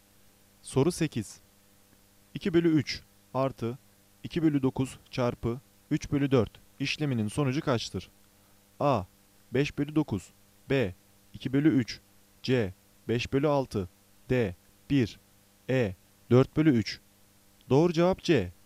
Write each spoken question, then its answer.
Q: 2 bölü 3 artı 2 bölü 9 çarpı 3 bölü 4 işleminin sonucu kaçtır?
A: Doğru cevap C. 5 bölü 6